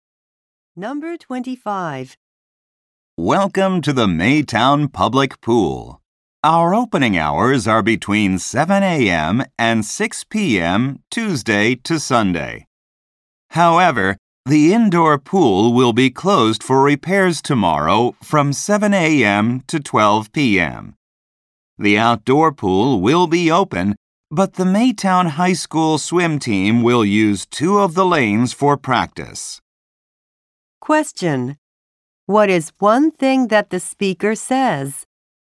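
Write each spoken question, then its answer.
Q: What is one thing that the speaker says?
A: The indoor pool will be closed tomorrow morning for repairs.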